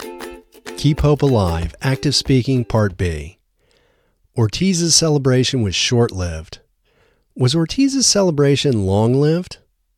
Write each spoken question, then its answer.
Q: Was Ortiz's celebration long-lived?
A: No, Ortiz's celebration wasn't long-lived, it was short-lived.